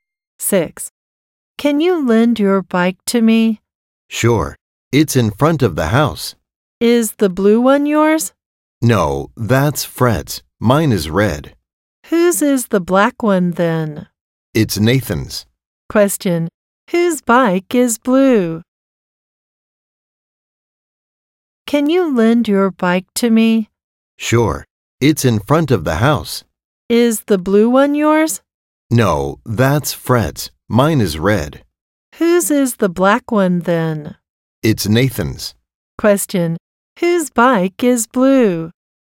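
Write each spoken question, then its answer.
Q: whose bike is blue?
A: Fred's.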